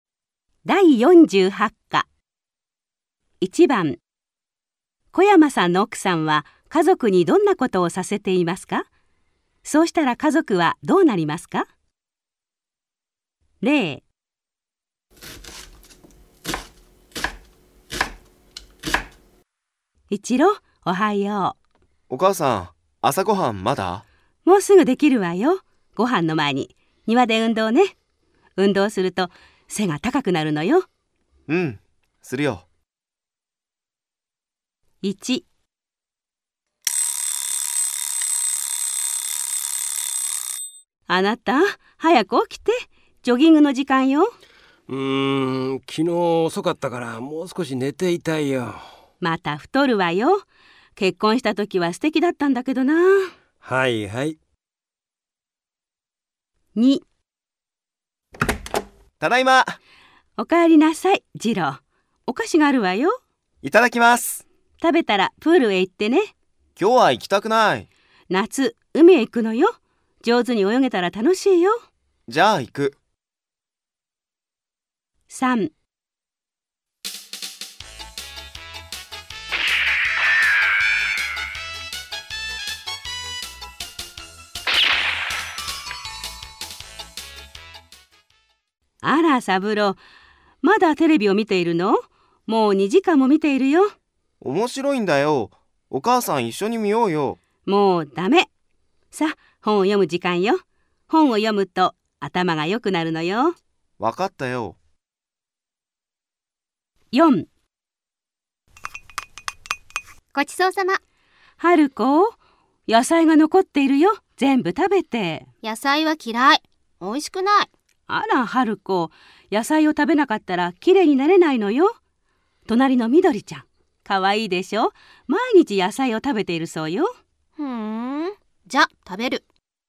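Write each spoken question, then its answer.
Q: 小山さんの奥さんは家族にどんなことをさせていますか?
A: ご主人にジョギングをさせています。そうしたら太らなくなります。

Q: 小山さんの奥さんは家族にどんなことをさせていますか?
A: 次郎くんにプールへ行かせています。そうしたら上手に泳げるようになります。

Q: 小山さんの奥さんは家族にどんなことをさせていますか?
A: サブロくんに本を読ませています。そうしたら頭が良くなります。

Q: 小山さんの奥さんは家族にどんなことをさせていますか?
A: 春子ちゃんに野菜を食べさせています。そうしたら綺麗になれます。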